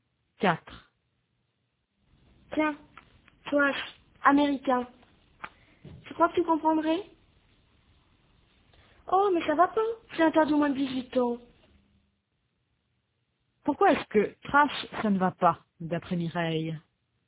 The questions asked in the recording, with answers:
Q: Pourquoi est-ce que trash, ça ne va pas, d'après Mireille?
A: Parce que c'est interdit au moins de 18 ans.